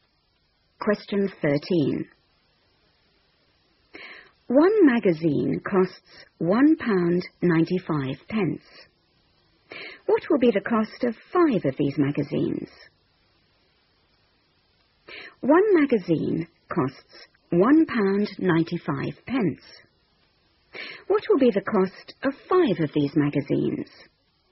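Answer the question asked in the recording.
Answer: £9.75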